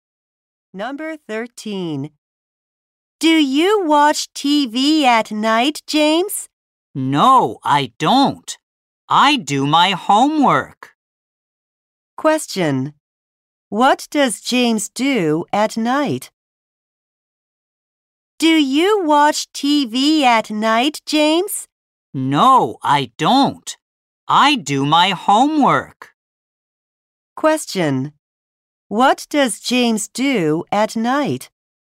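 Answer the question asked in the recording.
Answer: He does his homework.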